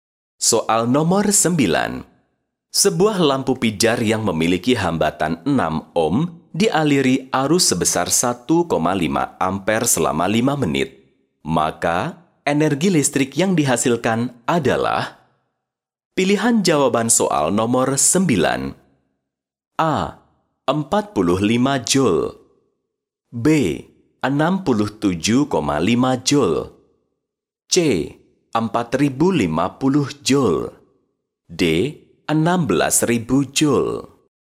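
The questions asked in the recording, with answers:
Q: Maka, energi listrik yang dihasilkan adalah?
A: C: 4050 joule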